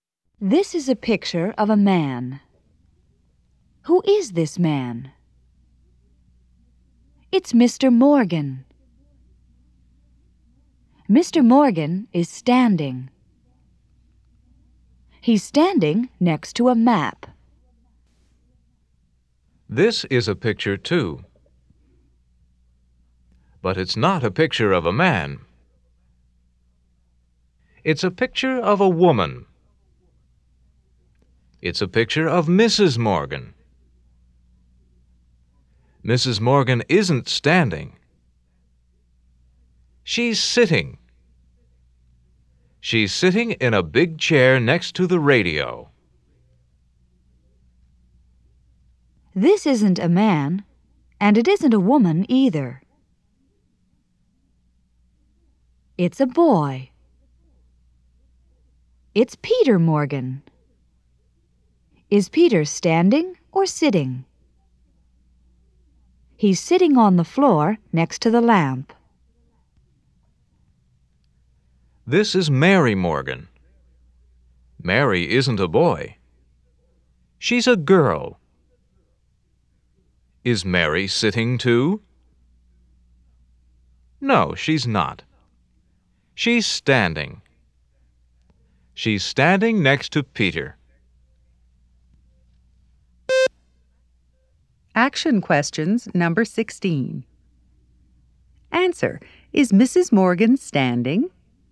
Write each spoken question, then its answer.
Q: Is Mrs. Morgan standing?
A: No, she's not.